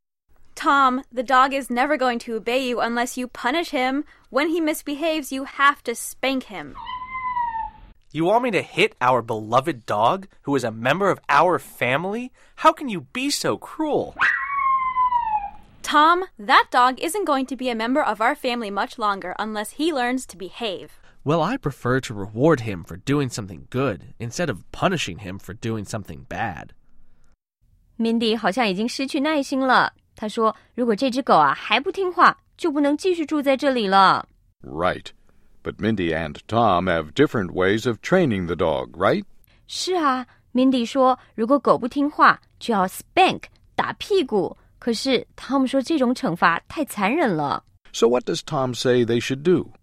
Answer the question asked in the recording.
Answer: Tom 觉得应该要采取鼓励的方法,也就是说,如果狗狗表现得好,就要 reward,奖励他。